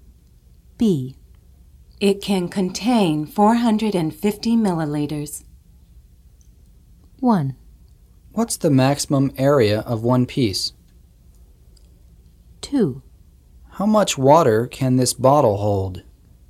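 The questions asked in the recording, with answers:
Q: It can contain 450 milliliters.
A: 2: How much water can this bottle hold?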